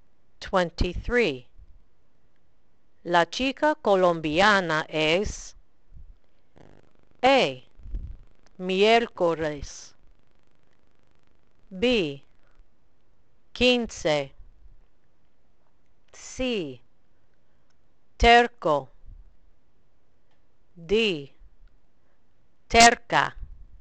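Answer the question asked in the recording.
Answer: D: terca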